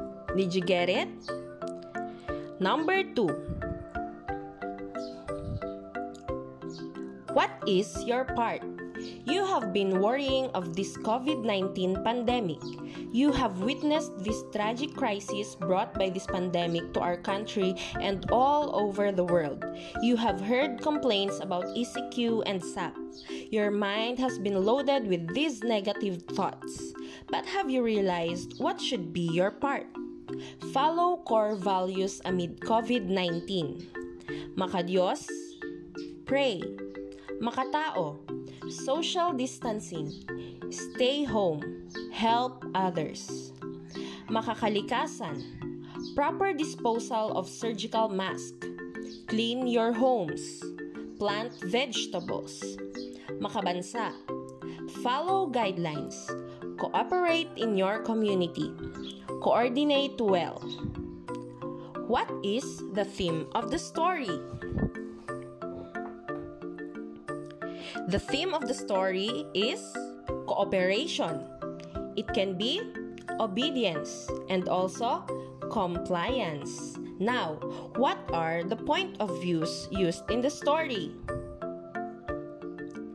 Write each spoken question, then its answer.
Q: What is the theme of the story?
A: The theme of the story is cooperation.